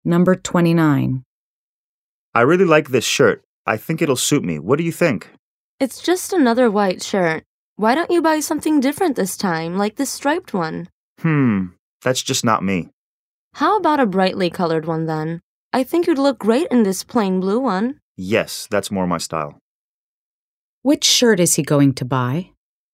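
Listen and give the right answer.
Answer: The plain blue one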